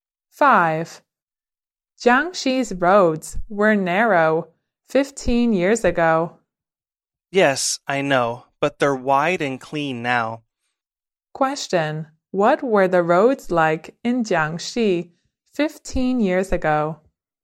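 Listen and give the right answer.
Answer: Narrow.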